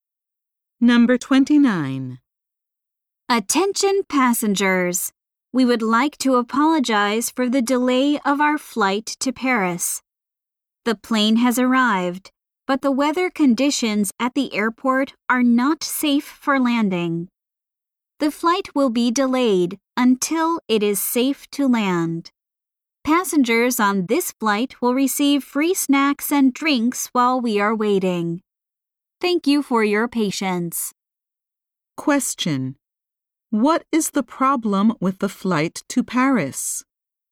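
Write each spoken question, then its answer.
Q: What is the problem with the flight to Paris?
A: The weather at the airport is not safe for landing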